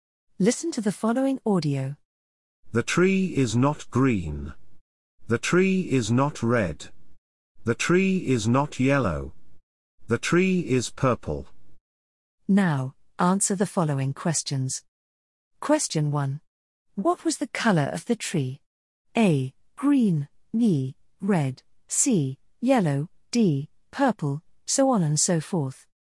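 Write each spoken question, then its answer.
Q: What was the color of the tree?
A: D: Purple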